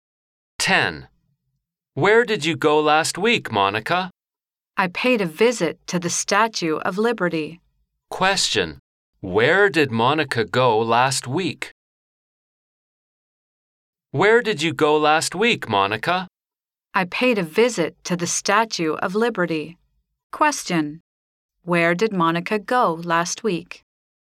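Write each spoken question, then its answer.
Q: Where did Monica go last week?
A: The Statue of Liberty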